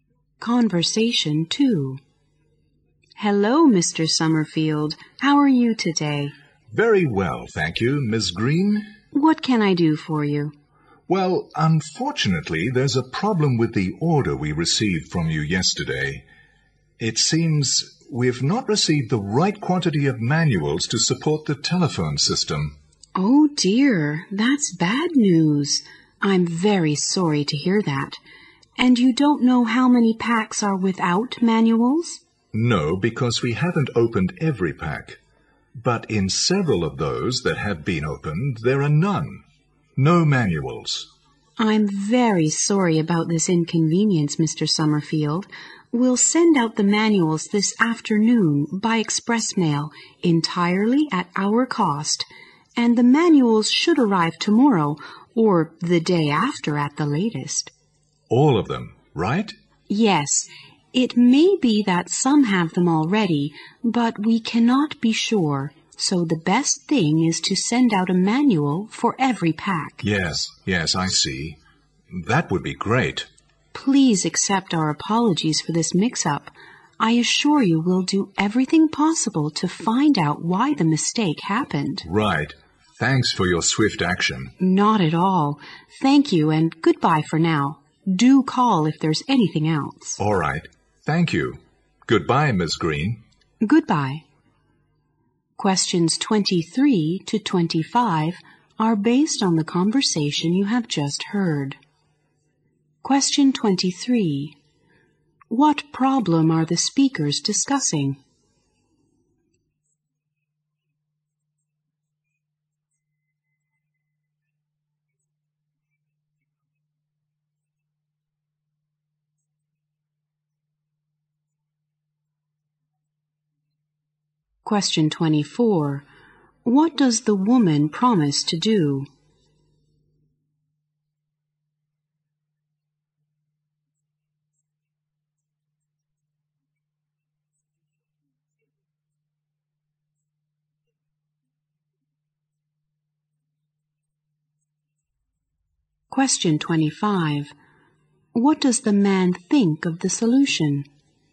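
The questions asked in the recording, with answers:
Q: What problem are the speakers discussing?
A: Some packs of the order arrived without manuals for the telephone system.

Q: What does the woman promise to do?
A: Send manuals for every pack by express mail that afternoon, at her company's cost.

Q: What does the man think of the solution?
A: He thinks it's great and thanks her for acting quickly.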